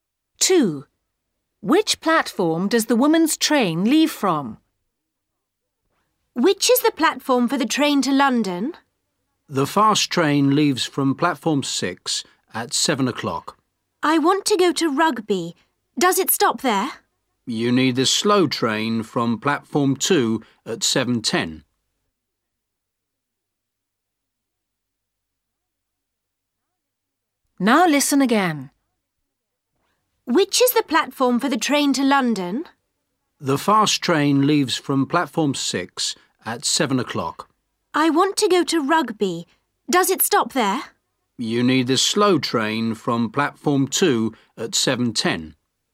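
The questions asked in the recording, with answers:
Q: Which platform does the woman's train leave from?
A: Platform 2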